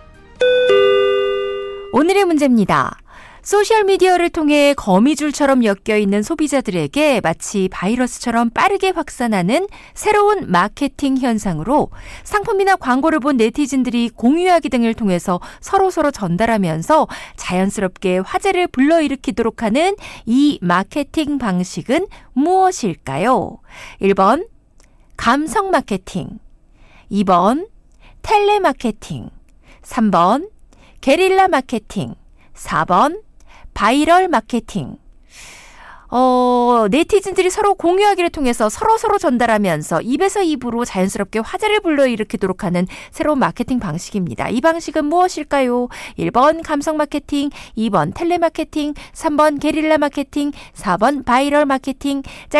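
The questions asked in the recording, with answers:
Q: 소셜미디어를 통해 거미줄처럼 엮여있는 소비자들에게 마치 바이러스처럼 빠르게 확산하는 새로운 마케팅 현상으로 상품이나 광고를 본 네티즌들이 공유하기 등을 통해서 서로서로 전달하면서 자연스럽게 화제를 불러일으키도록 하는 이 마케팅 방식은 무엇일까요?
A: 4: 바이럴 마케팅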